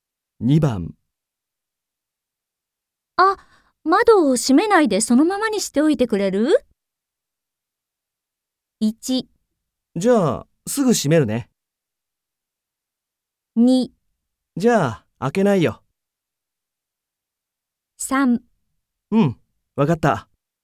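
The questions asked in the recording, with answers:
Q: あ、窓を閉めないでそのままにしておいてくれる?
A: 3: うん、わかった。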